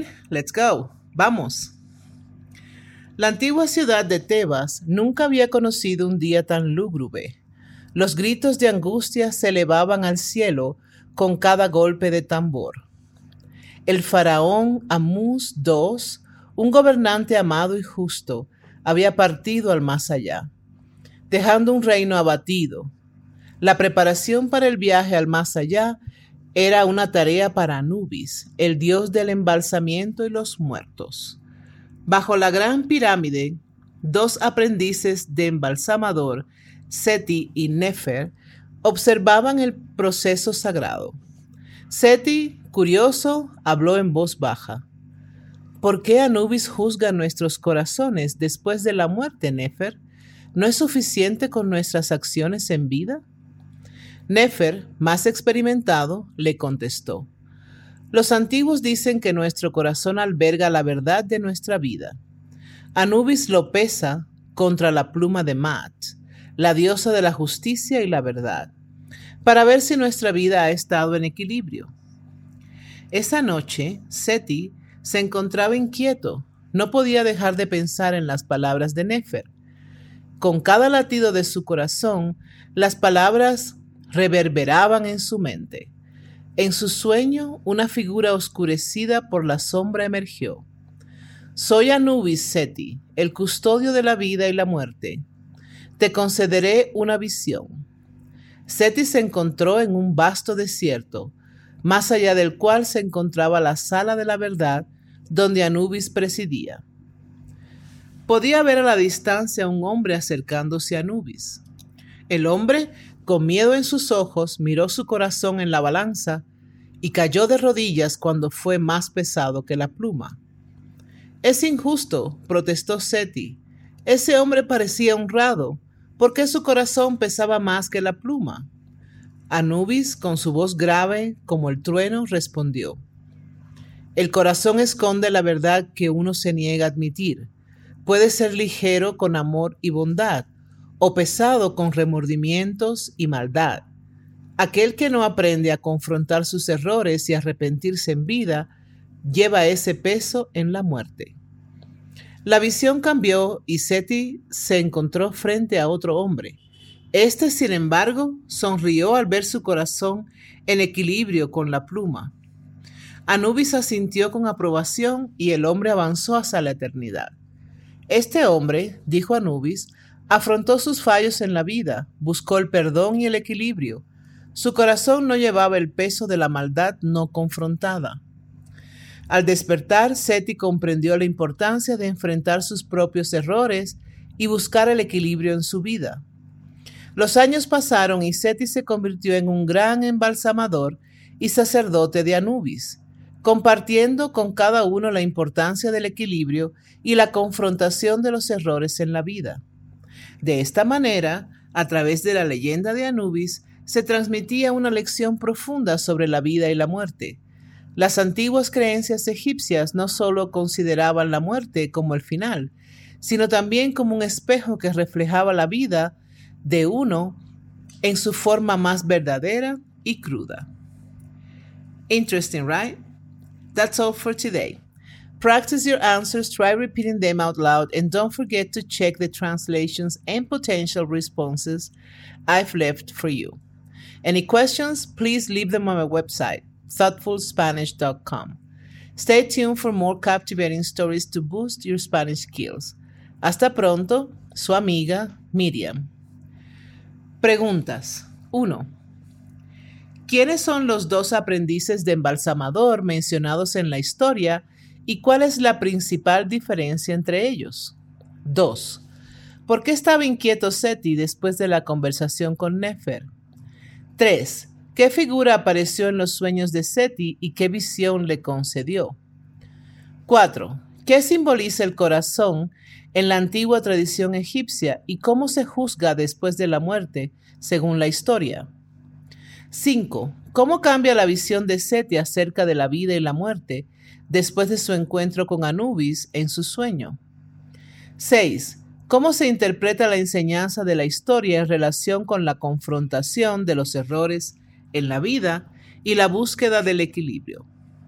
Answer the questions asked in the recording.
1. Los dos aprendices de embalsamador son Seti y Nefer. Seti es el más joven y está lleno de curiosidad, mientras Nefer es más experimentado y entendido en las tradiciones.
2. Seti estaba inquieto después de la conversación con Nefer porque estaba pensando en la justificación de la muerte y el juicio del corazón según las creencias egipcias.
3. En los sueños de Seti apareció Anubis, el dios egipcio del embalsamiento y los muertos. Anubis le concedió a Seti una visión del juicio de los corazones en el más allá.
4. Según la antigua tradición egipcia, el corazón simboliza la verdad de la vida de una persona. Después de la muerte se juzga pesándolo contra la pluma de Mat, la diosa de la justicia y la verdad.
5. Tras el encuentro con Anubis, Seti comprende la importancia de enfrentar sus errores y buscar el equilibrio en su vida.
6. La enseñanza de la historia sugiere que uno debe confrontar sus errores y buscar el equilibrio en su vida.